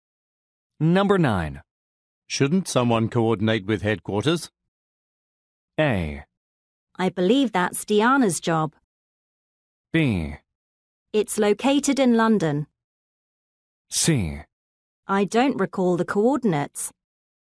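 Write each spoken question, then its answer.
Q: Shouldn't someone coordinate with headquarters?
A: A: I believe that's Diana's job.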